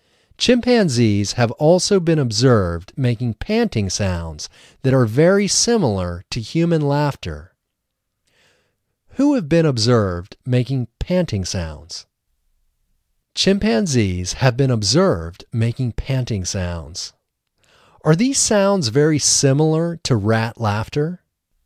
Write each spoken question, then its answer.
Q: Are these sounds very similar to rat laughter?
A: No, these sounds are not very similar to rat laughter.